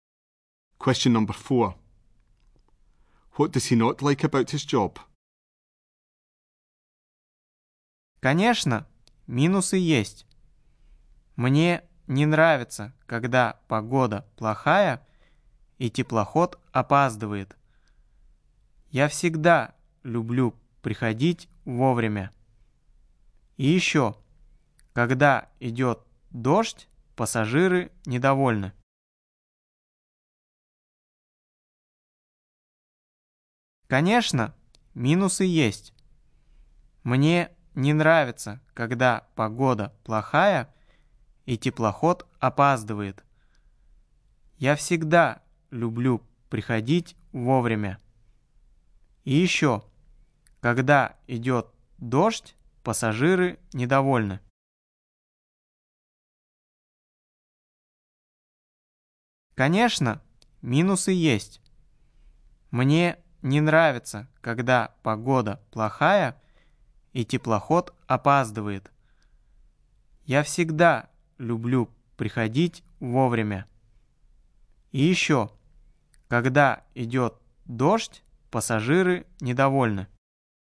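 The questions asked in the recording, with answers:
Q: What does he not like about his job?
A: When the weather is bad and the ship is late; passengers are unhappy when it rains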